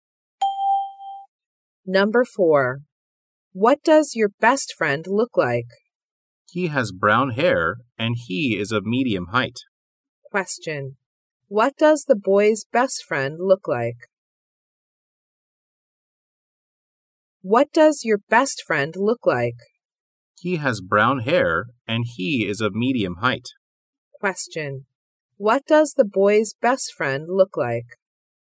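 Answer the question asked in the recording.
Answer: He has brown hair and is of medium height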